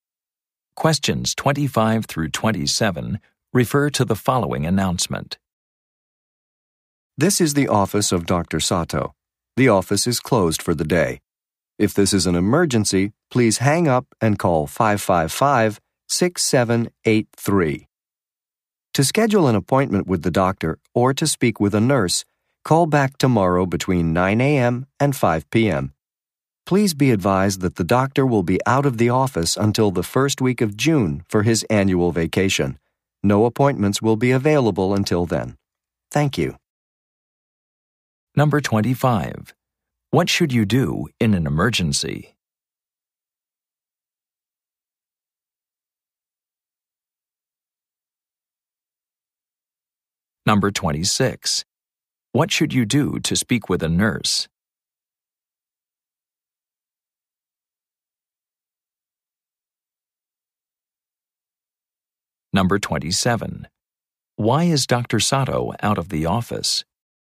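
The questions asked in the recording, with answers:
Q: What should you do in an emergency?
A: Call 555-6783

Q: What should you do to speak with a nurse?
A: Call back tomorrow between 9 a.m. and 5 p.m.

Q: Why is Dr. Sato out of the office?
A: He is on his annual vacation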